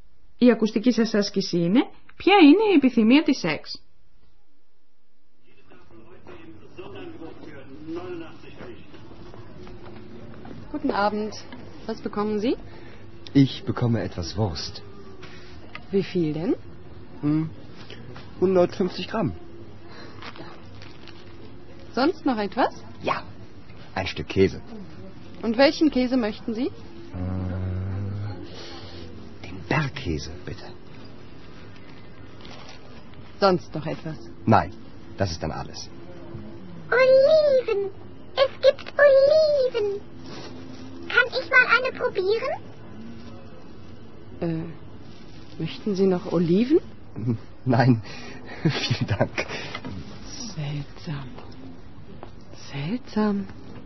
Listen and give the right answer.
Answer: Η Εξ είδε ξαφνικά ελιέ στον πάγκο τη πολίτριας και θα ήθελε πολύ να δοκιμάσει μία.